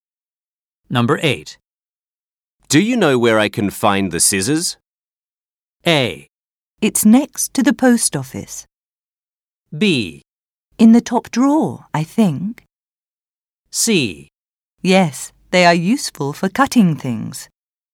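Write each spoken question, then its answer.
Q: Do you know where I can find the scissors?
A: B: In the top drawer, I think.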